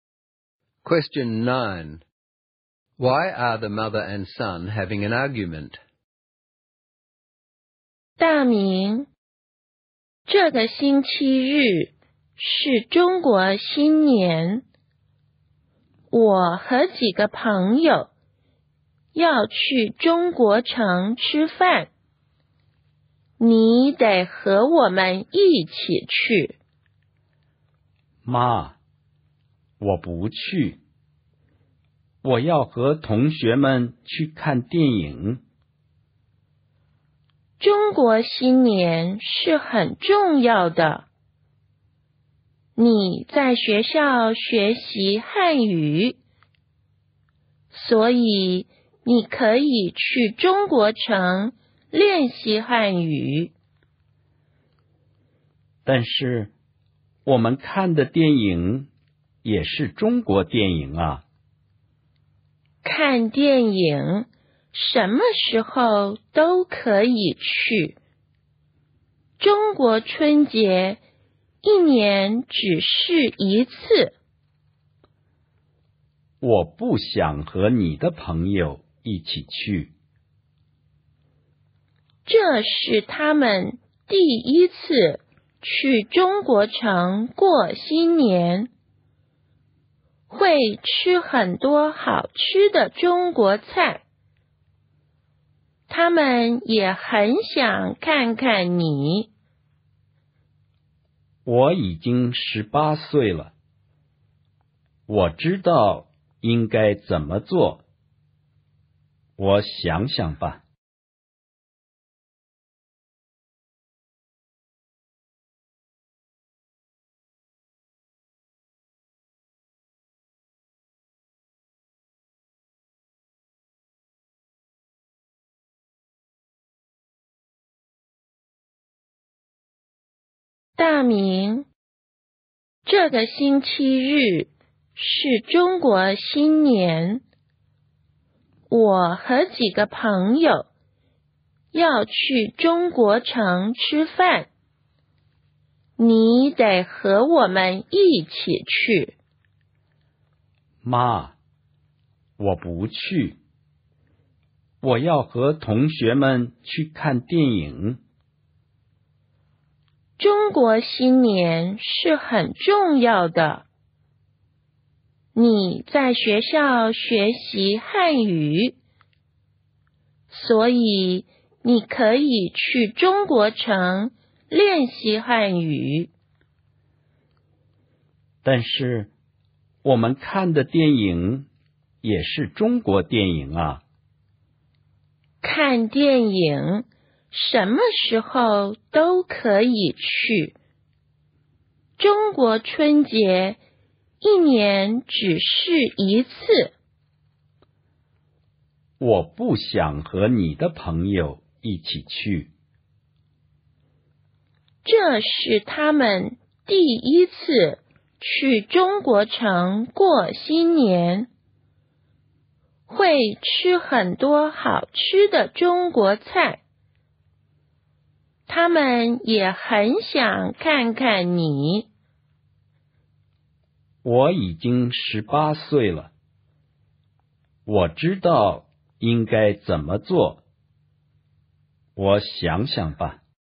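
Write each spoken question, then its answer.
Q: Why are the mother and son having an argument?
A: She wants him to go to Chinatown with her friends for Chinese New Year, but he wants to see a movie with classmates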